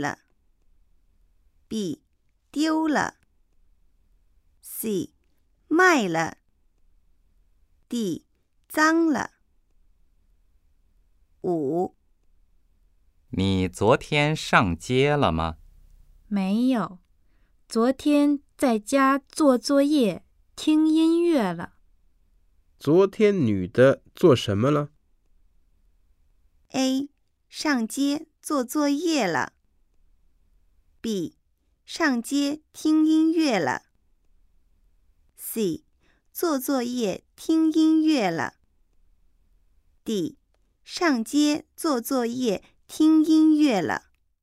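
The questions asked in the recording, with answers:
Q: 昨天女的做什么了?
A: C: 做作业听音乐了。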